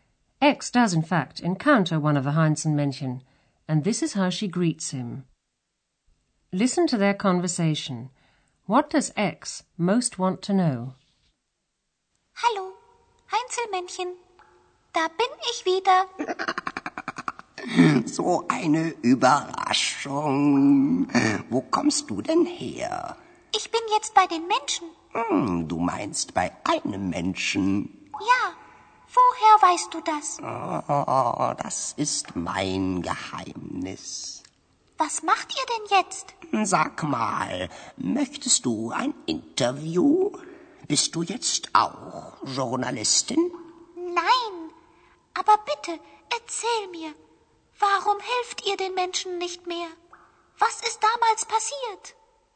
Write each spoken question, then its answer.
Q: What does X most want to know?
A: X is most interested in finding out why the Heinzelmännchen no longer help humans.